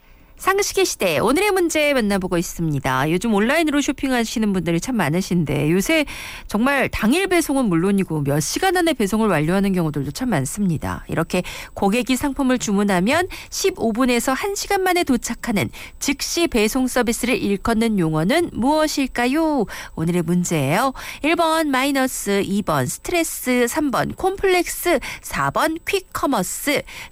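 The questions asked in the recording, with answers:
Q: 이렇게 고객이 상품을 주문하면 15분에서 1시간 만에 도착하는 즉시 배송 서비스를 일컫는 용어는 무엇일까요?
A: 4: 퀵커머스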